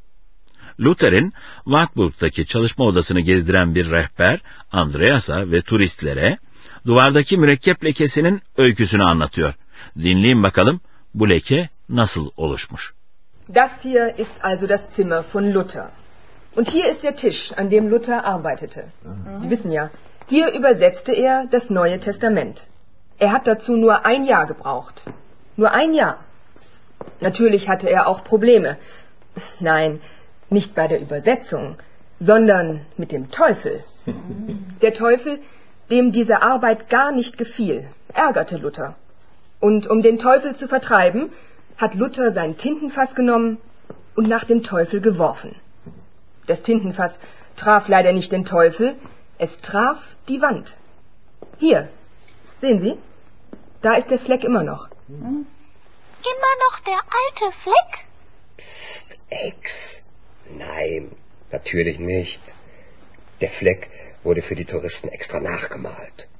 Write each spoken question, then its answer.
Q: Dinleyin bakalım bu leke nasıl oluşmuş.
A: Ama ne yazık ki mürekkep hokkası şeytana rastlamamış da duvara çarpmış.